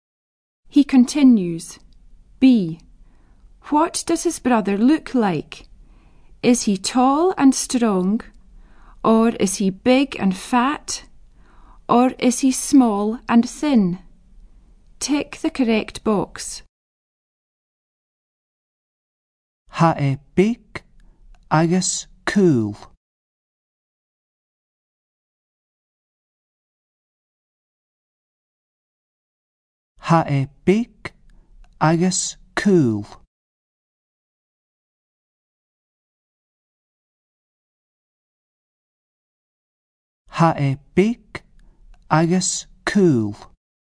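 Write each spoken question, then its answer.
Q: What does his brother look like?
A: Small and thin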